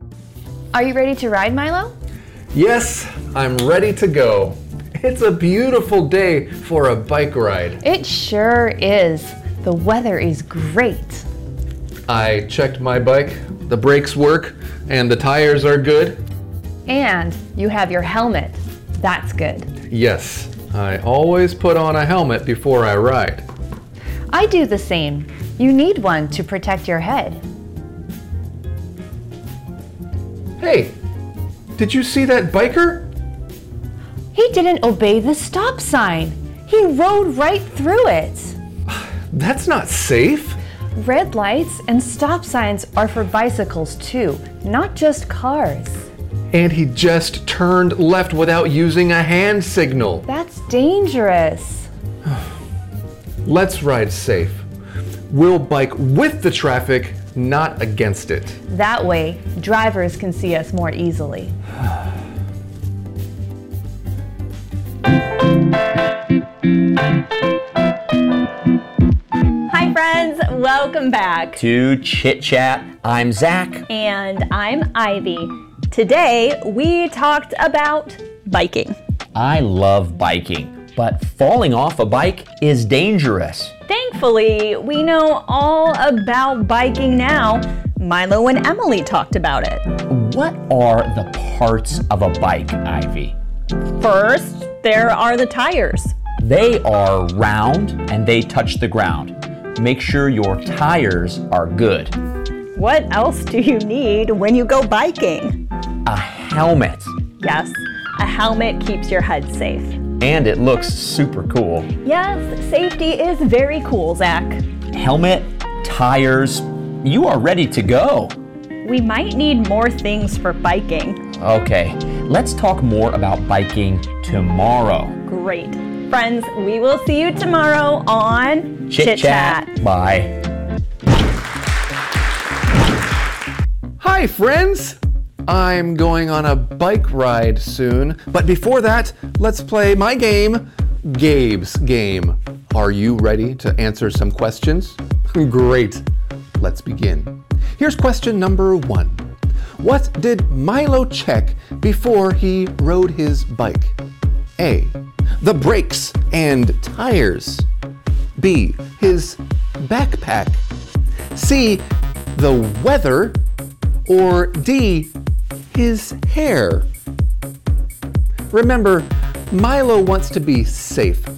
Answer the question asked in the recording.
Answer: If you said A. The brakes and tires, you are right.